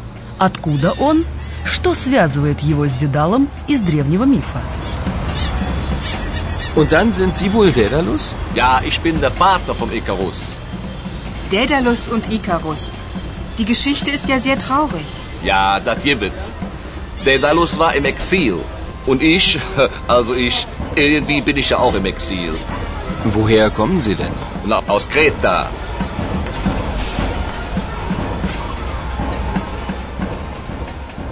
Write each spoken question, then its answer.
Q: Откуда он?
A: В ответ на вопрос «Откуда вы?» человек называет остров Крит, Крета.

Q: Что связывает его с Дедалом из древнего мифа?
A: Участник карнавала в костюме Дедала напоминает, что Дедал жил в изгнании, эксиль.